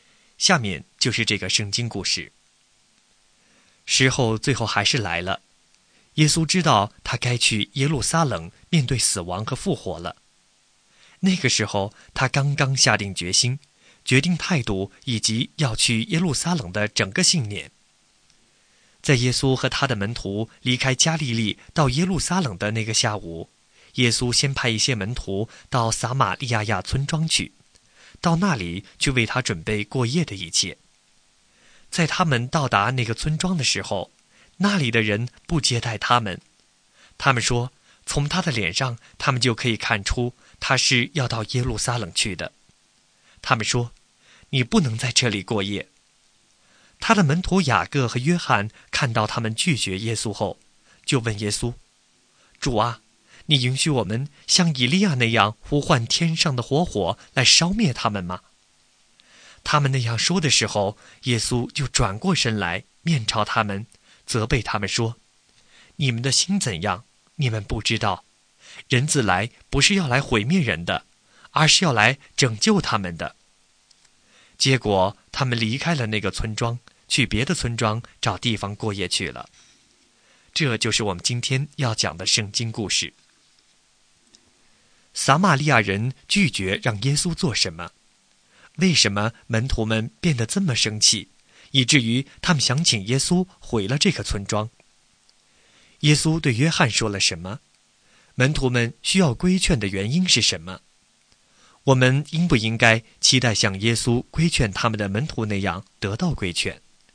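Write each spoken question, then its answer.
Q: 撒玛利亚人拒绝让耶稣做什么?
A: 在他们的村子里过夜

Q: 为什么门徒们变得这么生气,以至于他们想请耶稣毁了这个村庄?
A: 因为撒玛利亚人拒绝接待耶稣

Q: 耶稣对约翰说了什么?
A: 你们的心怎样你们不知道,人子来不是要毁灭人,而是要拯救人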